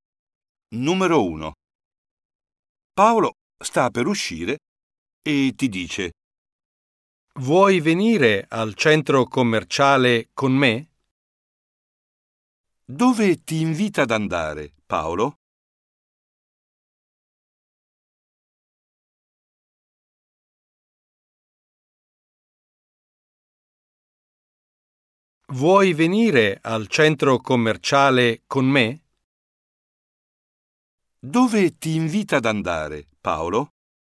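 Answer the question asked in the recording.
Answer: al centro commerciale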